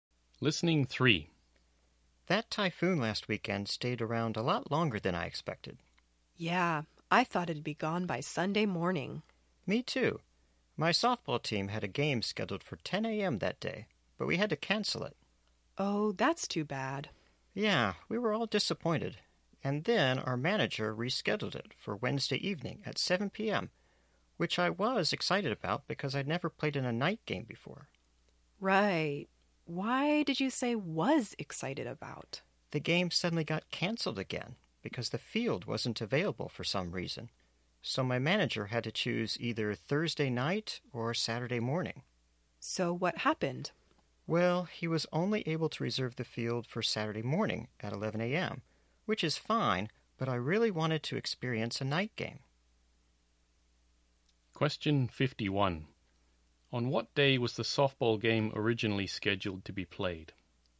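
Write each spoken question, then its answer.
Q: On what day was the softball game originally scheduled to be played?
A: Sunday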